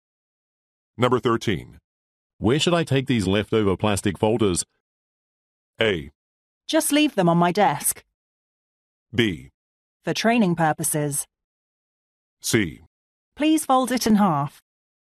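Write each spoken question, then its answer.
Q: Where should I take these leftover plastic folders?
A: A: Just leave them on my desk.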